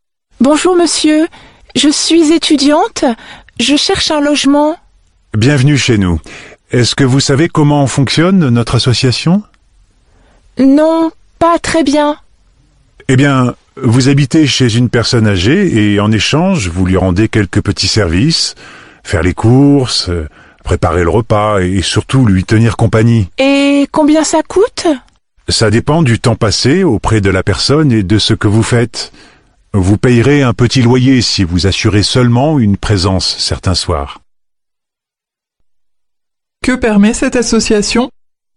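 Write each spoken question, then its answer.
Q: Que permet cette association?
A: De loger chez une personne âgée en échange de petits services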